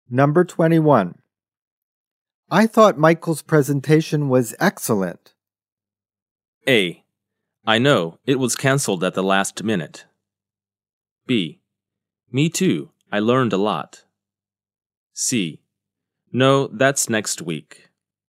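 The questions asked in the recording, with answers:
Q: I thought Michael's presentation was excellent.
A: B: Me too, I learned a lot.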